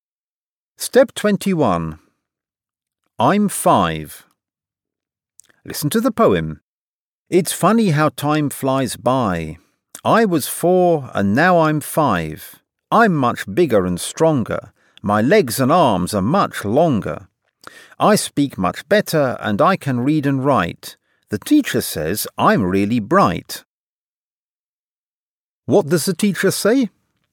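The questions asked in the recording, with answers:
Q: What does the teacher say?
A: That I'm really bright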